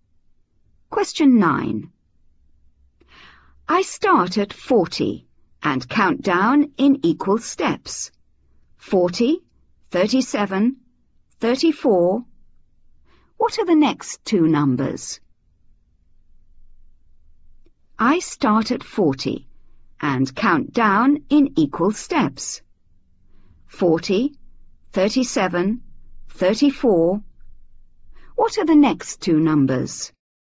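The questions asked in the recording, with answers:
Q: 40, 37, 34. What are the next two numbers?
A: 31, 28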